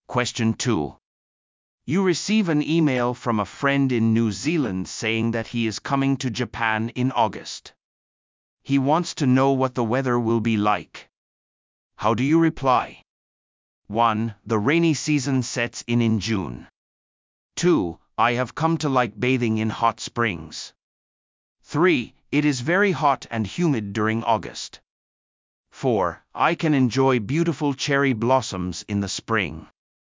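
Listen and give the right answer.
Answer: 3: It is very hot and humid during August.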